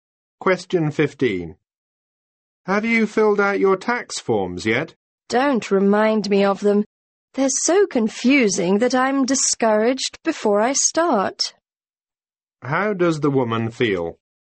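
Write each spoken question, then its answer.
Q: How does the woman feel?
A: Discouraged; she finds the tax forms confusing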